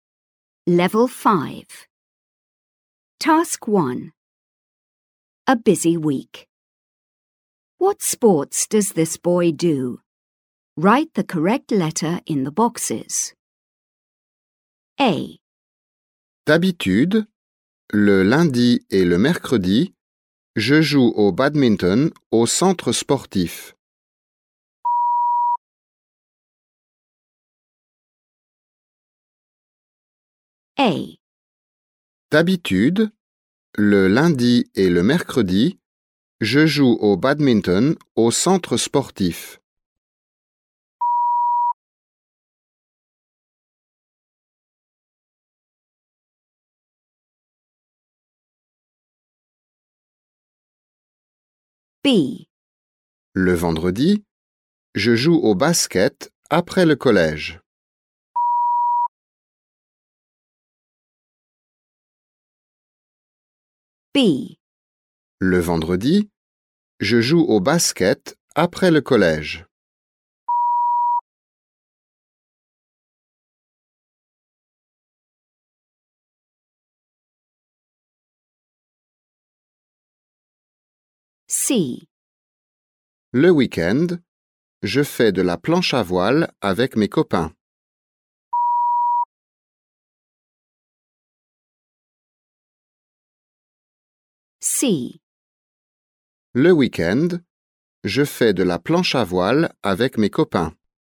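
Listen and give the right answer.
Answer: Badminton, basketball and windsurfing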